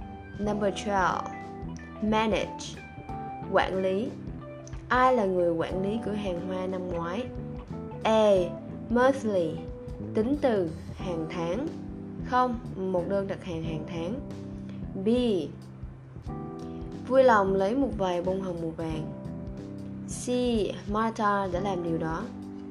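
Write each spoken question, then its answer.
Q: Ai là người quản lý cửa hàng hoa năm ngoái?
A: C: Martha đã làm điều đó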